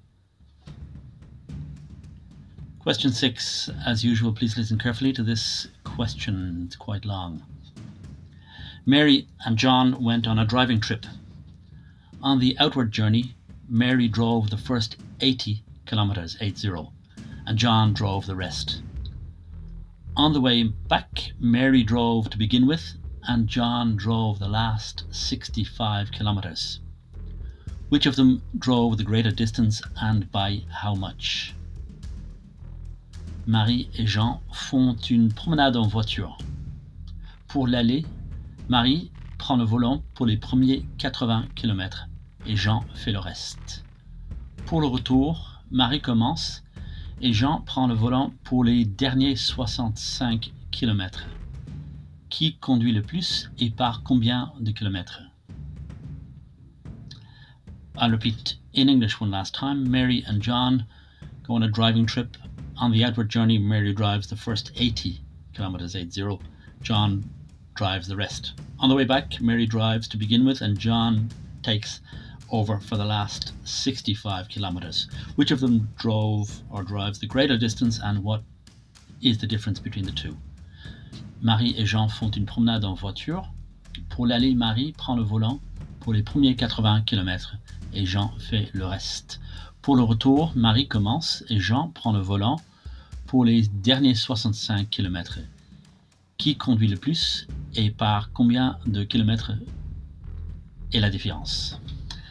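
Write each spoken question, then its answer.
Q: Which of them drove the greater distance and by how much?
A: Mary, by 30 kilometers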